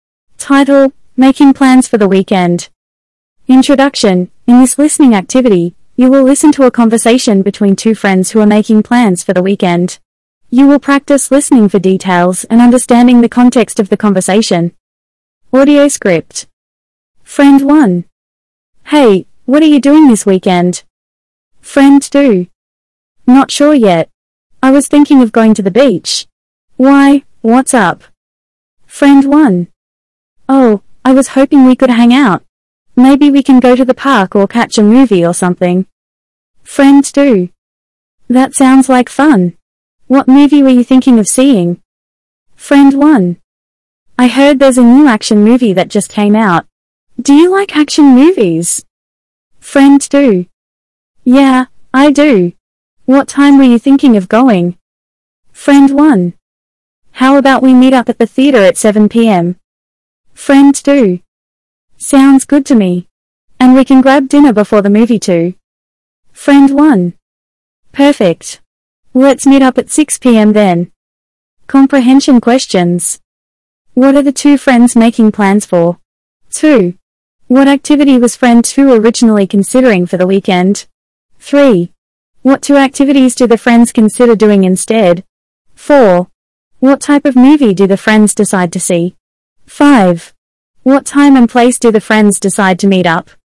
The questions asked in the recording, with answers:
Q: What are the two friends making plans for?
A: The two friends are making plans for the weekend.

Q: What activity was friend 2 originally considering for the weekend?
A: Friend 2 was originally considering going to the beach.

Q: What two activities do the friends consider doing instead?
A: The friends consider going to the park or seeing a movie.

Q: What type of movie do the friends decide to see?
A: The friends decide to see an action movie.